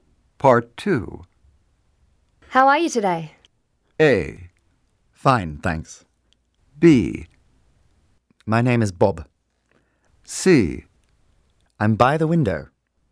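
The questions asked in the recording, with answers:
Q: How are you today?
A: A: Fine, thanks.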